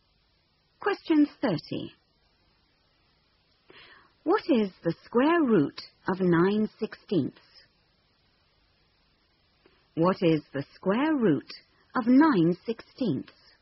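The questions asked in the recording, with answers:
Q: What is the square root of 9/16?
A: 3/4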